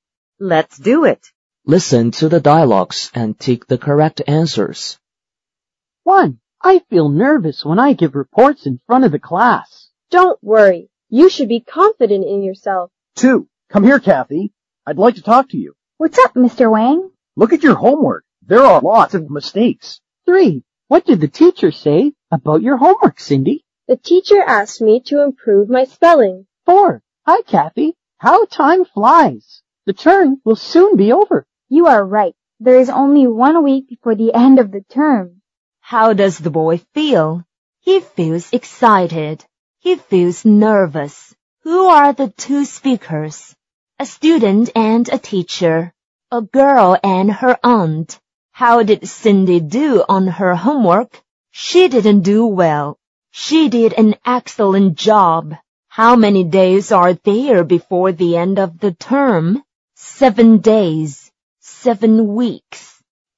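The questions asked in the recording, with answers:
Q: How does the boy feel?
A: He feels nervous.

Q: Who are the two speakers?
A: A student and a teacher.

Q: How did Cindy do on her homework?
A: She didn't do well.

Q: How many days are there before the end of the term?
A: 7 days.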